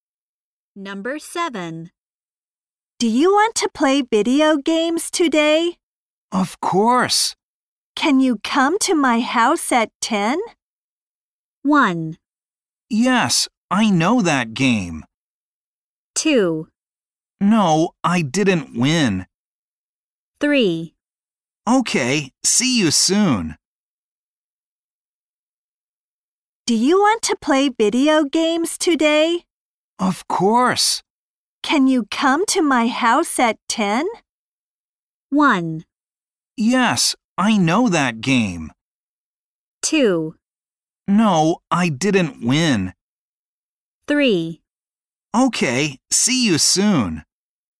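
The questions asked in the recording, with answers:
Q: Can you come to my house at 10?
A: 3: Okay, see you soon.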